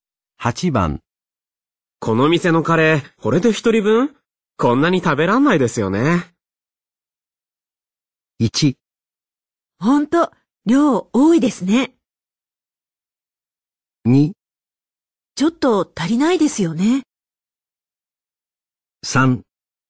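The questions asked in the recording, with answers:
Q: この店のカレー、これで一人分こんなに食べらんないですよね。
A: 1: ほんと、量多いですね。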